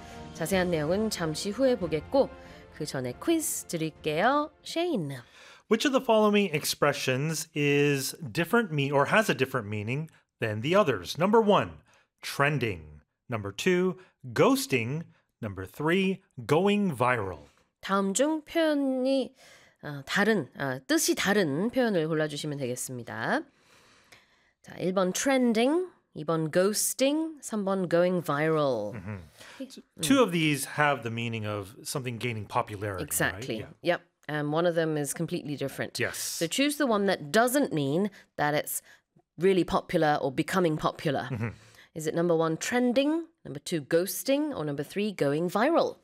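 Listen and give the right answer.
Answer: 2: ghosting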